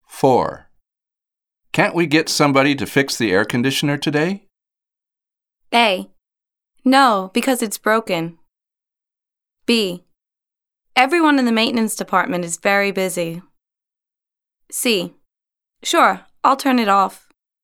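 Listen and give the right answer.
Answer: B: Everyone in the maintenance department is very busy.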